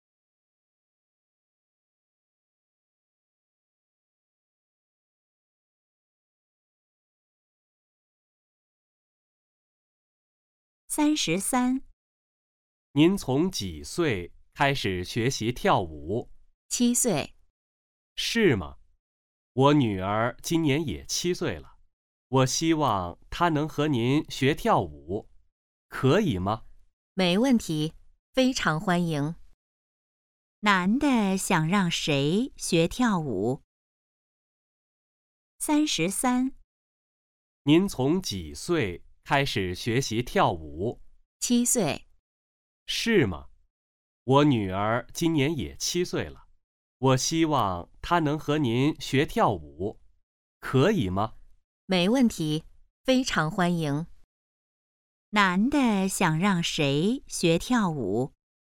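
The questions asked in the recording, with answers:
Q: 男的想让谁学跳舞?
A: 他的女儿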